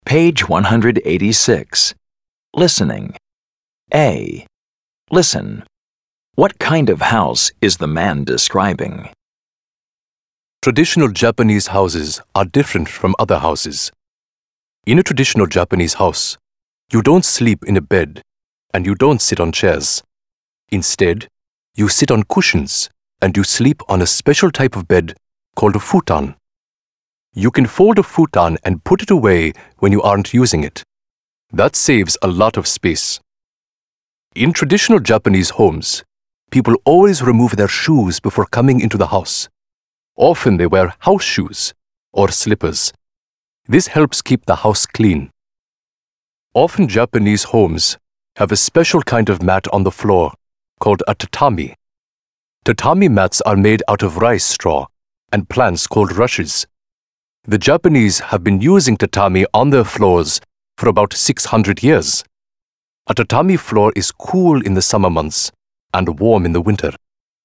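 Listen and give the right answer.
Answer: A traditional Japanese house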